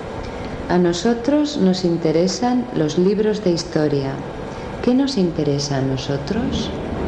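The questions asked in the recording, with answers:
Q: ¿Qué nos interesa a nosotros?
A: Los libros de historia.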